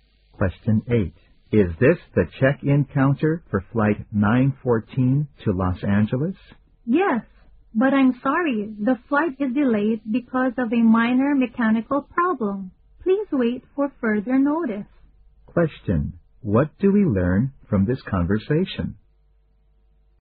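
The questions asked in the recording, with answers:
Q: What do we learn from this conversation?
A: Flight 914 to Los Angeles is delayed because of a minor mechanical problem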